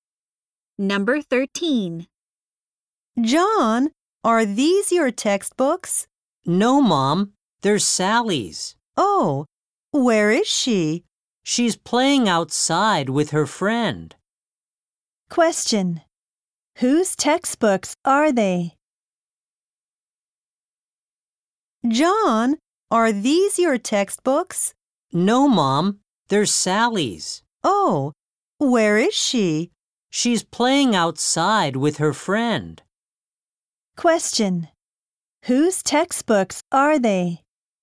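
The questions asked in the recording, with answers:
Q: Whose textbooks are they?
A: Sally's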